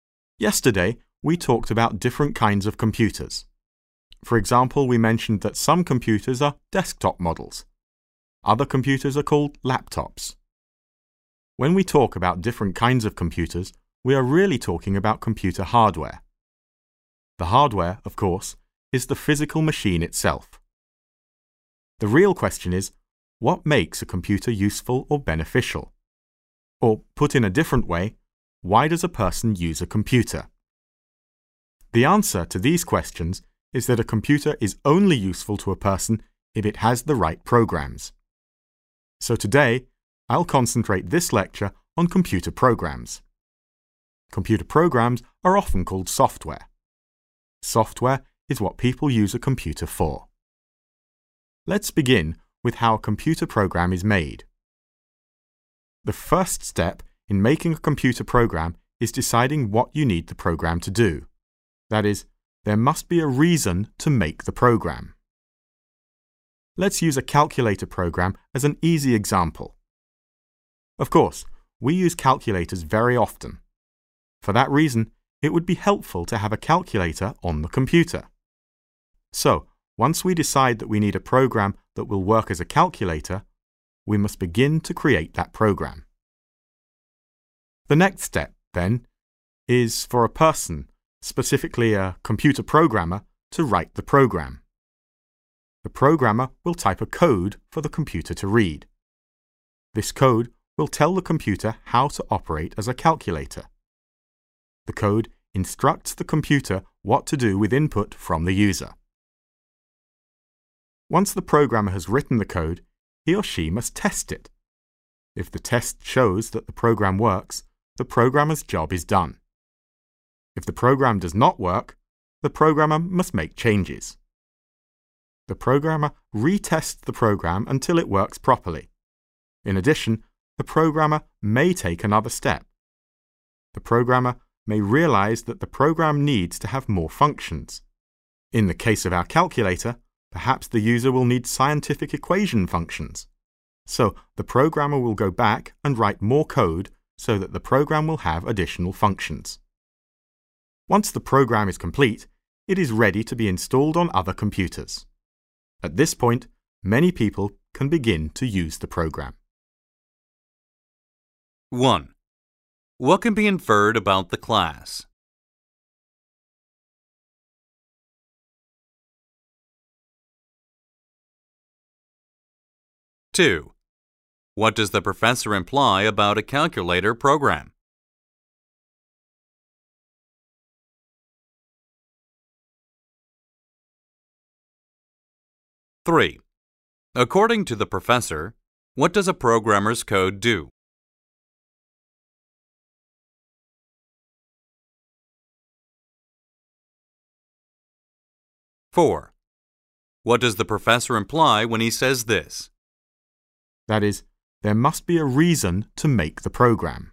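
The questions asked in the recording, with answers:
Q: According to the professor, what does a programmer's code do?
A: It tells the computer how to operate and what to do with input from the user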